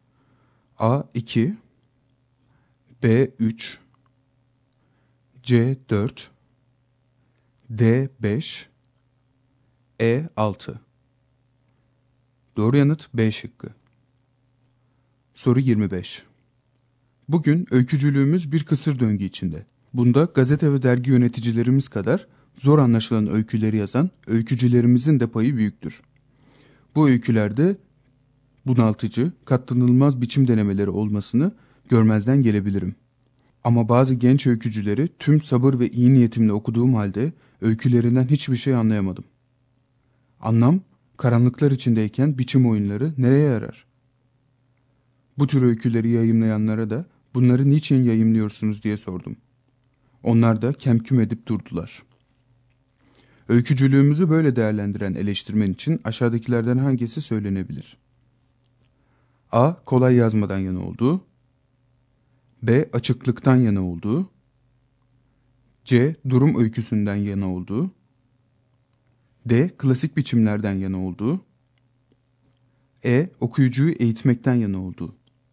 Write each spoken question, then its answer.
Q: Öykücülüğümüzü böyle değerlendiren eleştirmen için aşağıdakilerden hangisi söylenebilir?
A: Doğru yanıt B şıkkı.